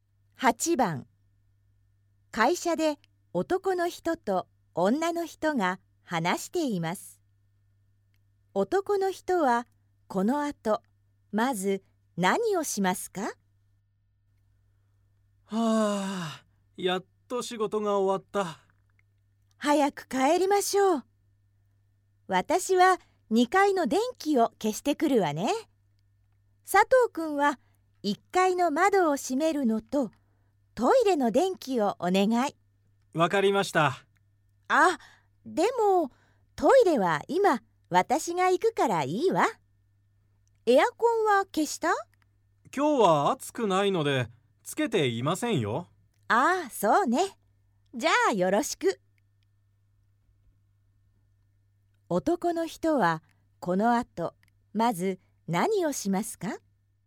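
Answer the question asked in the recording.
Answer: 1階の窓を閉める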